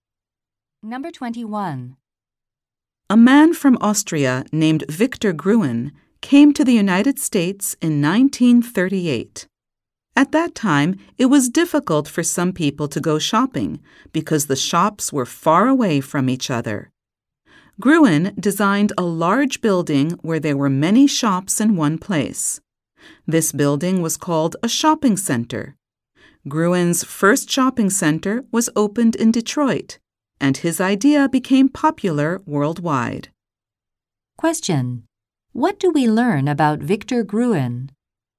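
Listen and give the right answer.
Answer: He designed the first shopping center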